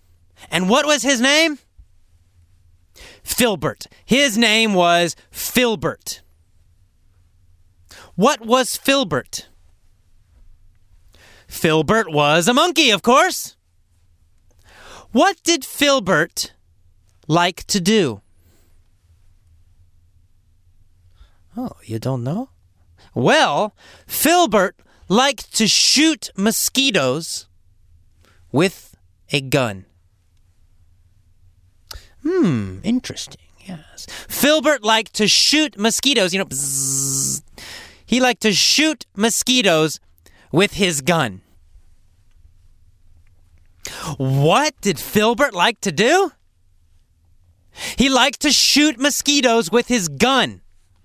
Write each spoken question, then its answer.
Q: What did Filbert like to do?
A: He liked to shoot mosquitoes with his gun.